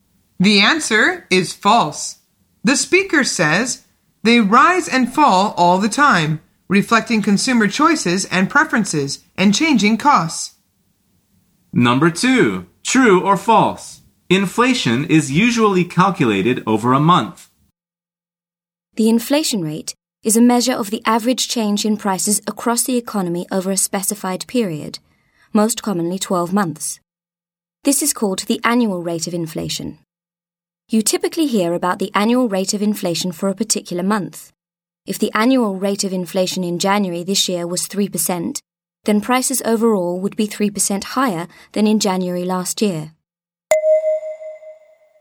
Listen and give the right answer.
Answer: The answer is false.